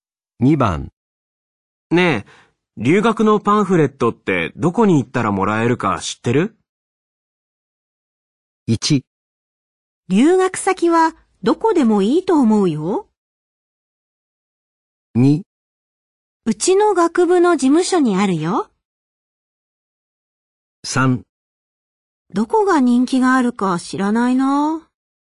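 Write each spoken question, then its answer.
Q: ねえ、留学のパンフレットってどこに行ったらもらえるか知ってる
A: 2: うちの学部の事務所にあるよ。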